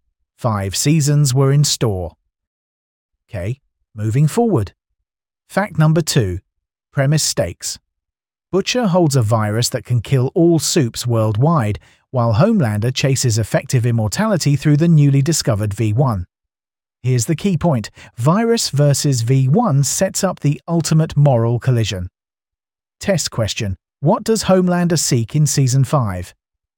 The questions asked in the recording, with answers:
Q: What does Homelander seek in Season 5?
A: Effective immortality via V1.